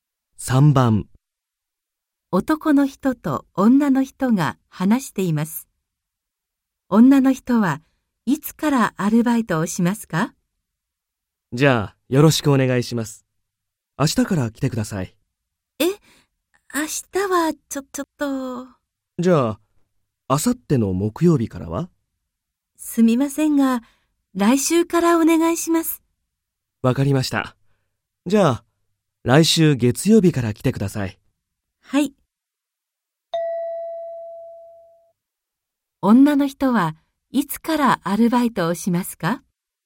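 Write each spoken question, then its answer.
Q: 女の人はいつからアルバイトをしますか?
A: 来週の月曜日から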